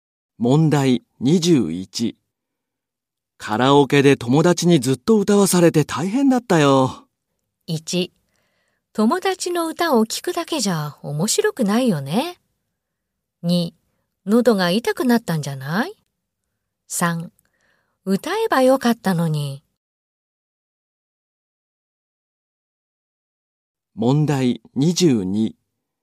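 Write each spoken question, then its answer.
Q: カラオケで友達にずっと歌わされて大変だったよ。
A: 3: 喉が痛くなったんじゃない?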